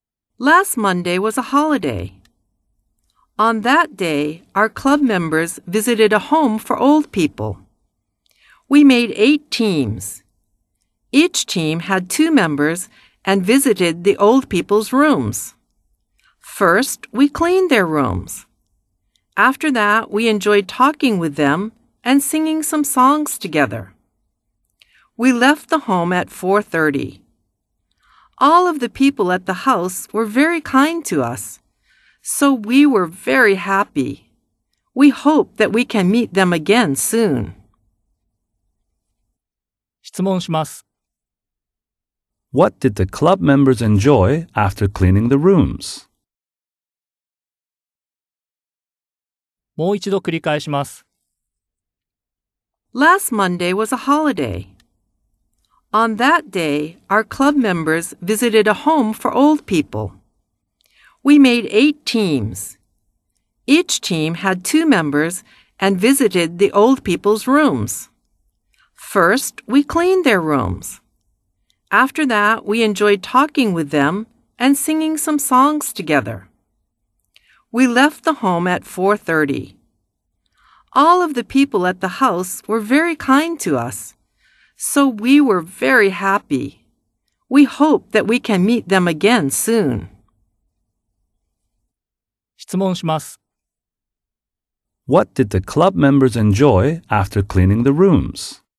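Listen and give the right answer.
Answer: Talking with the old people and singing some songs together.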